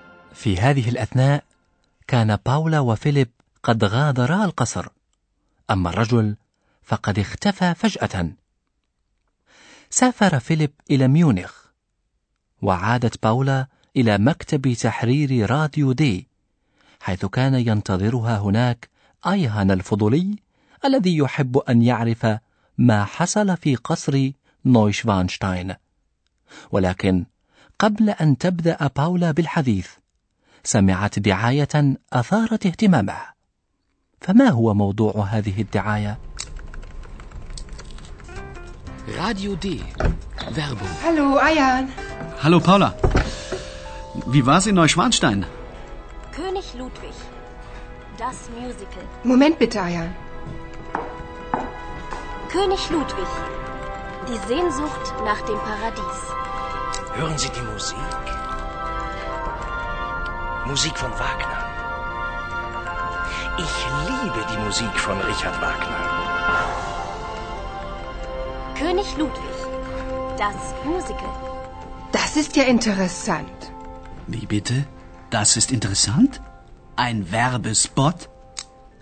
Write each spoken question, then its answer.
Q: فما هو موضوع هذه الدعايه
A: تتحدث الدعاية عن مسرحية موسيقية تدور حول حياة ووفاة الملك لودفيك الثاني.